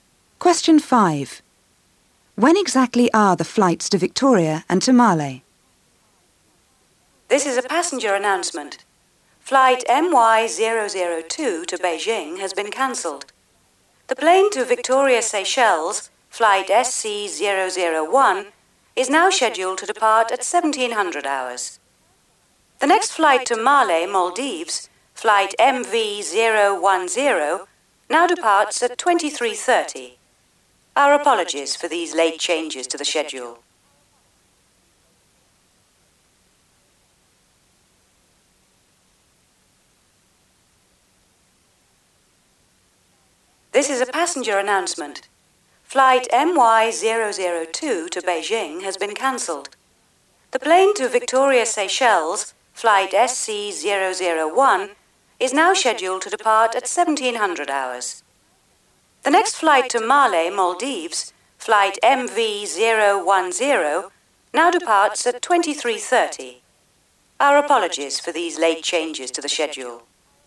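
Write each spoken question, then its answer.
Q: When exactly are the flights to Victoria and to Male?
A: Victoria at 1700 hours; Male at 2330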